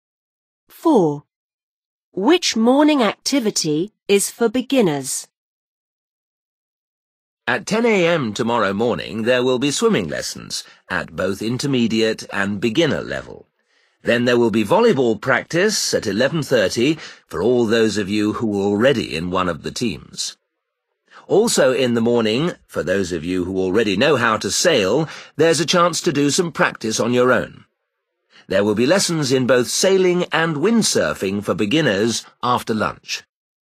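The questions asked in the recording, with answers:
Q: Which morning activity is for beginners?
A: swimming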